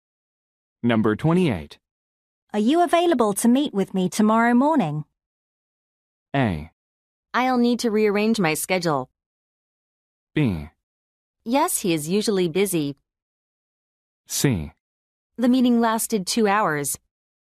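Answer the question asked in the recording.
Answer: A: I'll need to rearrange my schedule.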